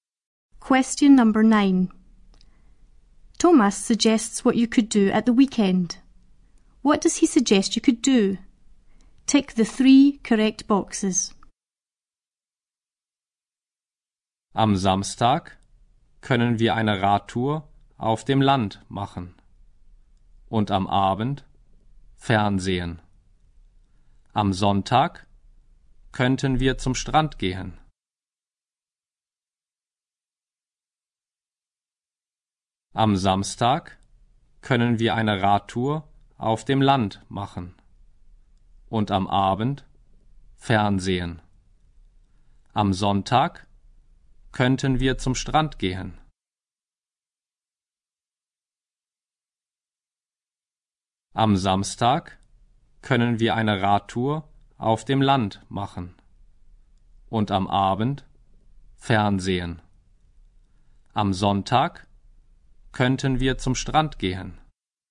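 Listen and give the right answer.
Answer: A bike ride in the country, watch TV in the evening, go to the beach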